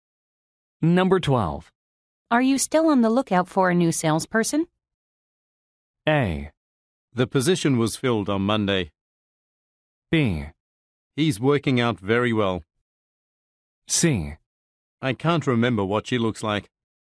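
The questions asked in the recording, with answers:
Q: Are you still on the lookout for a new salesperson?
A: A: The position was filled on Monday.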